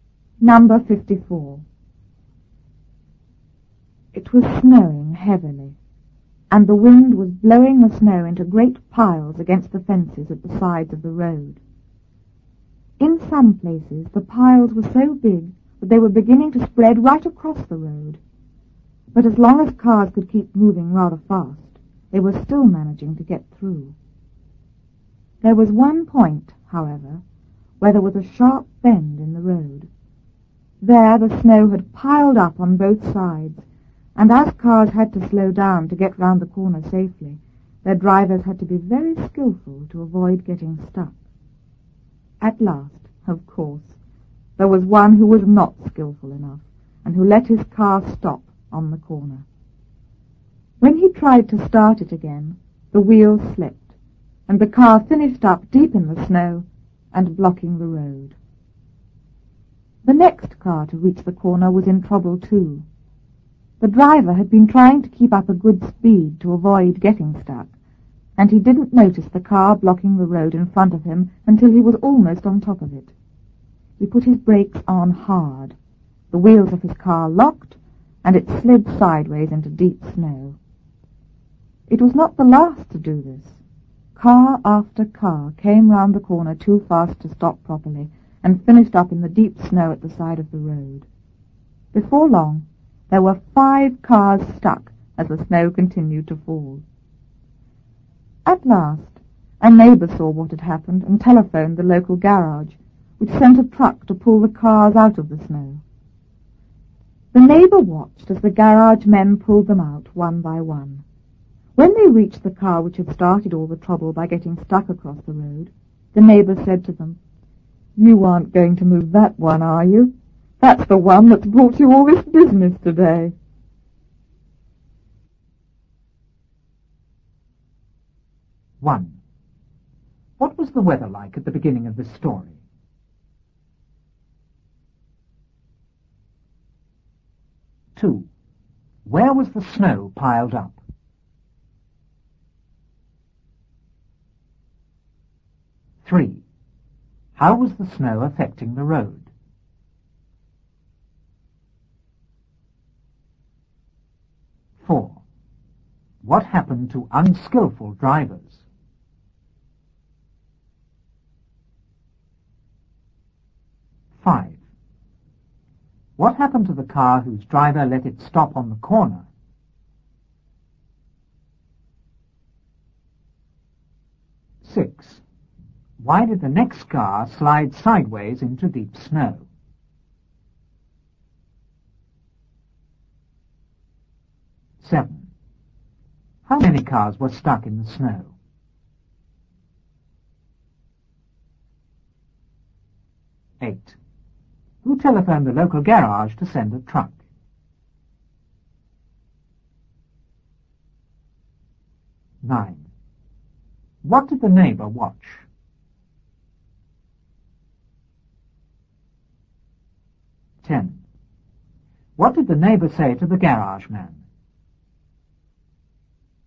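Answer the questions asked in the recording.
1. It was snowing heavily and windy.
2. Against the fences at the sides of the road.
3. The piles were beginning to spread across the road.
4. They got stuck in the snow.
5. The wheels slipped and it ended up deep in the snow, blocking the road.
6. The driver braked hard and the wheels locked.
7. Five
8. A neighbour
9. The garage men pulling the cars out one by one.
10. "You aren't going to move that one, are you? That's the one that's brought you all this business today."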